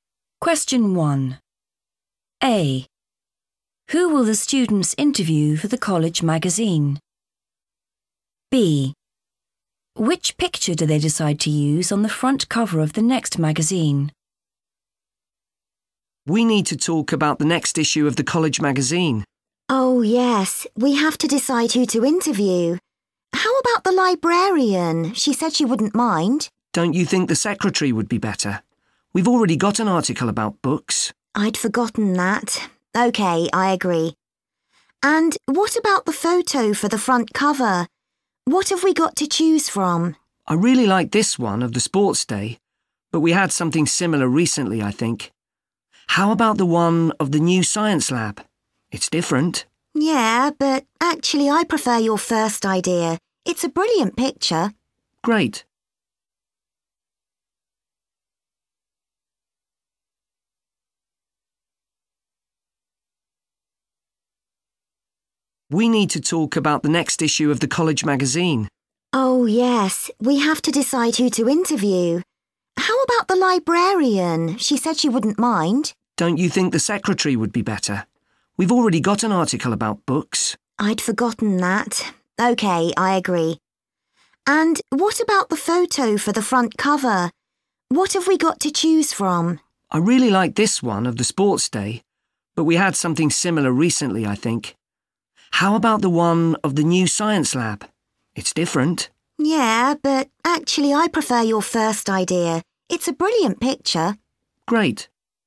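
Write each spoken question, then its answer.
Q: Who will the students interview for the college magazine?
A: the secretary

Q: Which picture do they decide to use on the front cover of the next magazine?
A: the sports day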